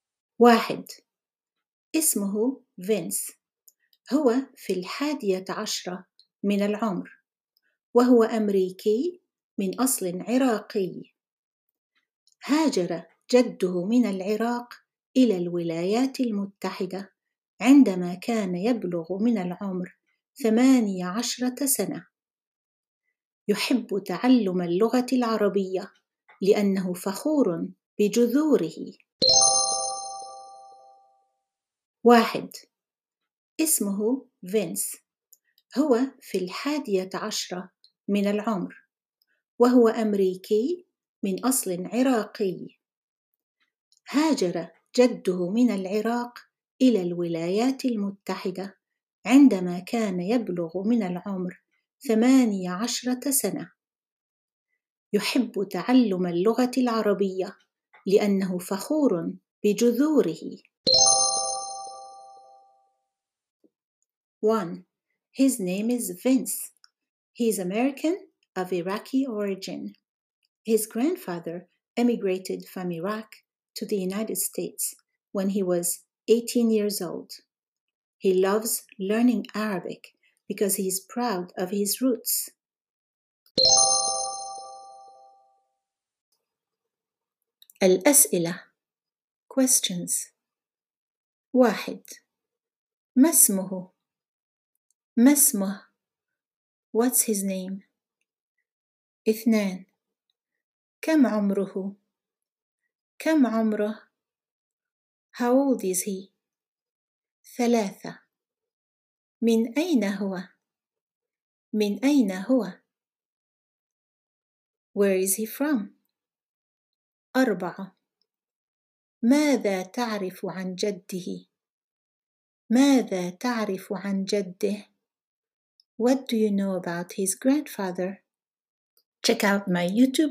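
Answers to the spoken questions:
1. فينس
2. في الحادية عشرة من العمر
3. أمريكي من أصل عراقي
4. هاجر من العراق إلى الولايات المتحدة عندما كان يبلغ من العمر 18 سنة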